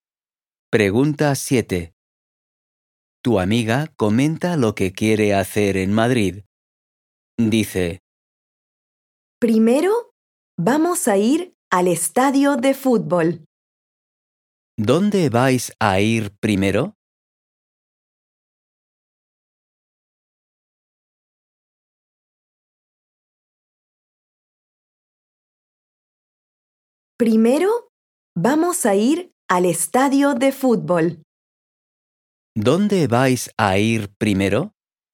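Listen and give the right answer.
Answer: Al estadio de fútbol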